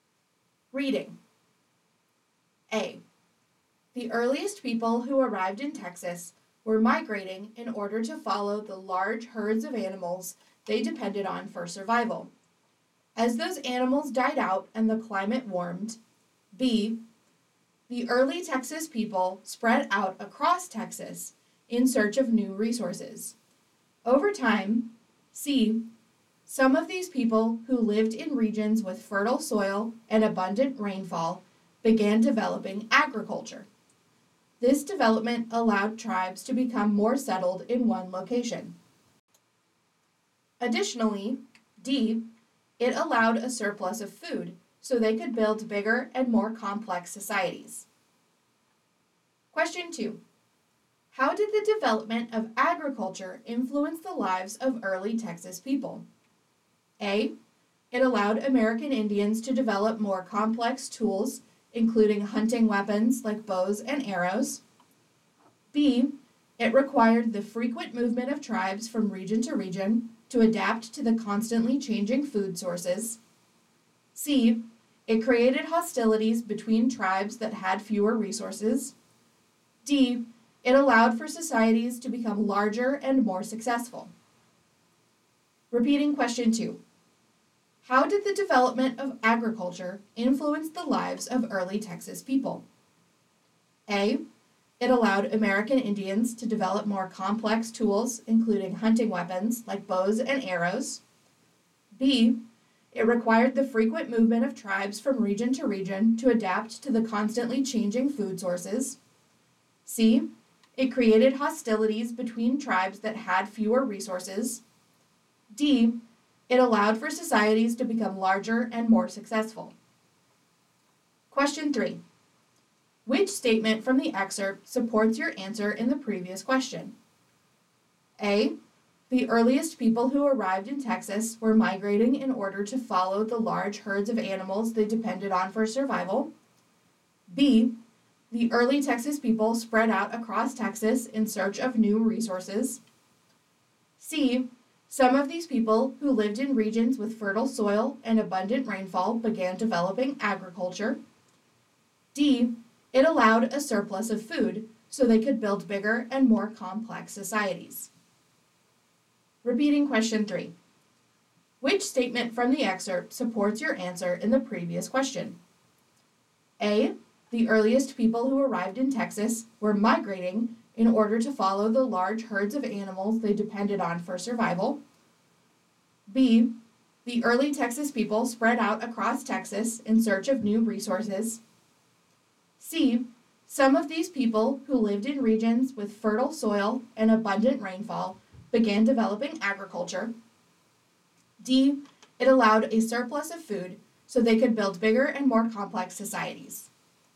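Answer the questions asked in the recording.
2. D: It allowed for societies to become larger and more successful.
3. D: it allowed a surplus of food so they could build bigger and more complex societies.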